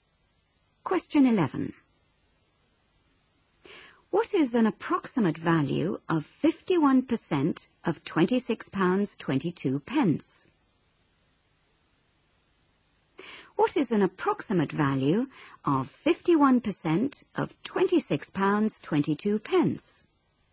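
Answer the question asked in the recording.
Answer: About £13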